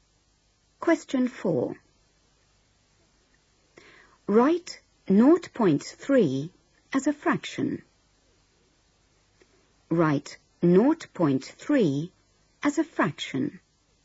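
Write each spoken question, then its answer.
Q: Write 0.3 as a fraction.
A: 3/10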